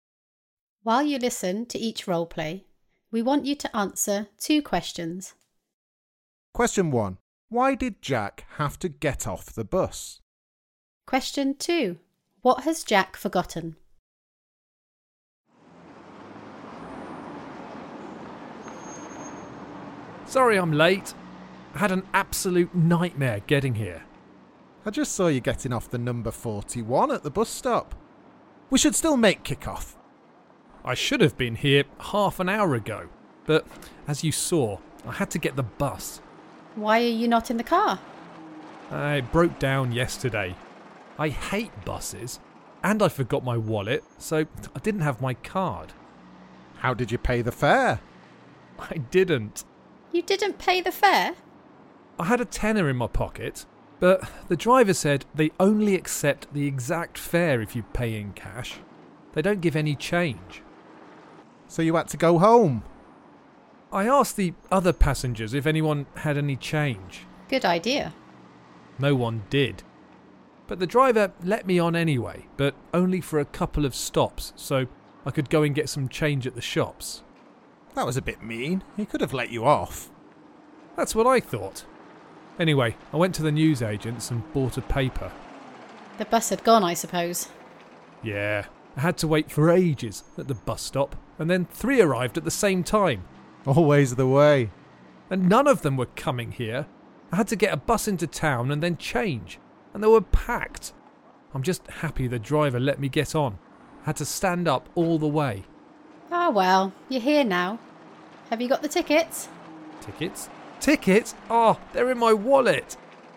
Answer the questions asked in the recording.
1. Usually I pay by card on the bus, but I'd forgotten my wallet.
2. The answer was the tickets.